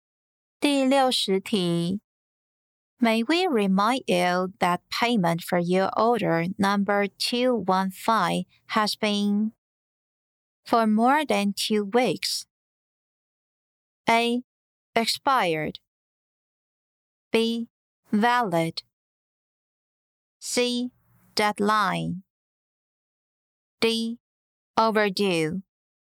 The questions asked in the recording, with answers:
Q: May we remind you that payment for your order number 215 has been for more than 2 weeks?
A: 正确答案为 D. Overdue.